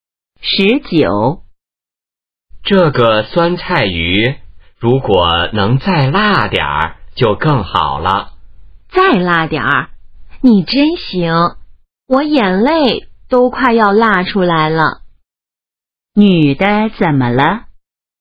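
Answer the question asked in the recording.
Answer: 被辣得快流眼泪了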